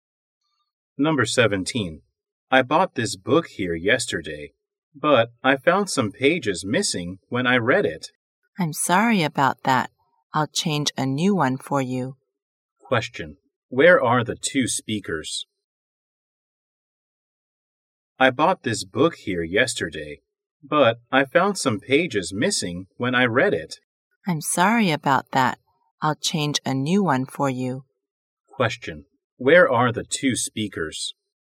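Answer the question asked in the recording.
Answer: In a bookstore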